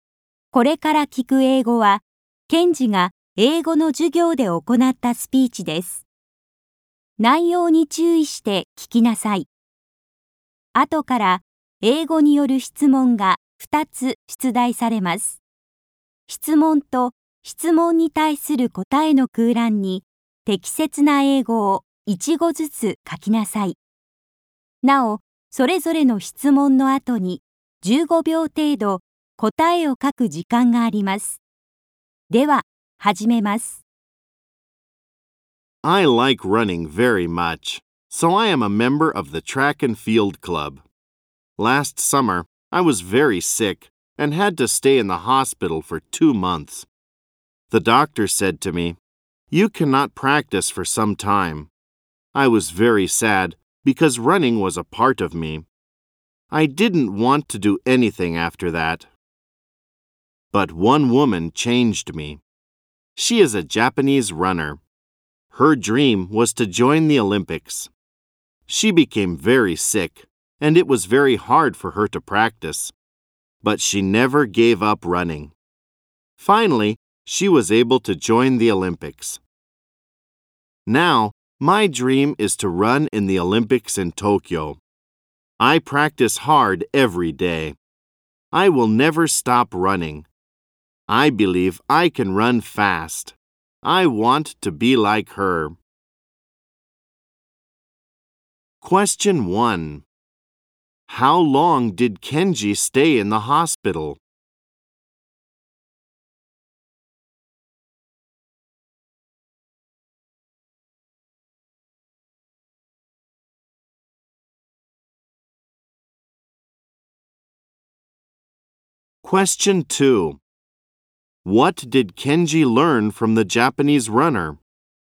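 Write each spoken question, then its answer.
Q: How long did Kenji stay in the hospital?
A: For two months.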